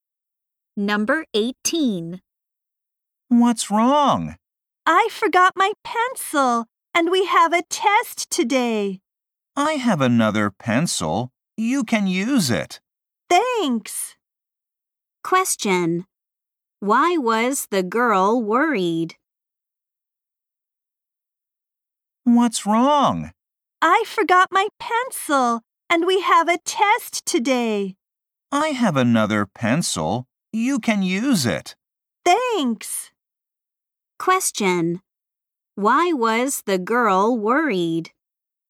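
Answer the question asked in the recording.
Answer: She forgot her pencil and they have a test today.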